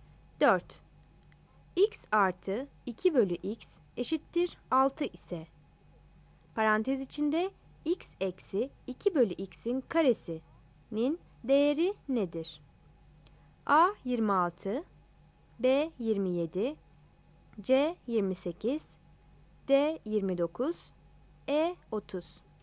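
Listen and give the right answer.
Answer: C: 28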